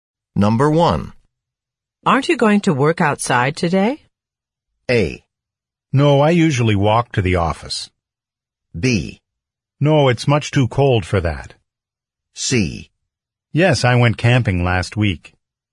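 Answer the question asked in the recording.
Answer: B: No, it's much too cold for that.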